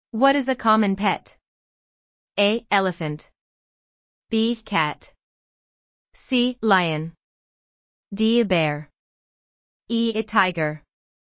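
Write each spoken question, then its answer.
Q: What is a common pet?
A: B: Cat.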